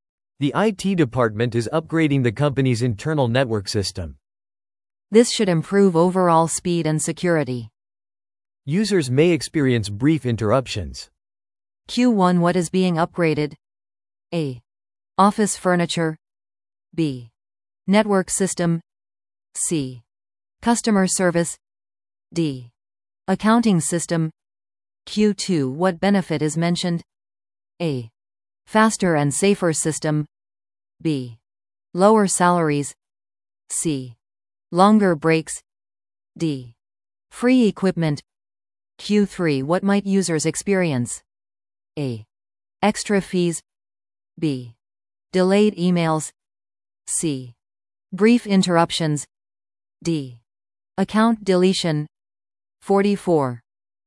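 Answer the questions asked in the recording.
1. B: Network system.
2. A: Faster and safer system.
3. C: Brief interruptions.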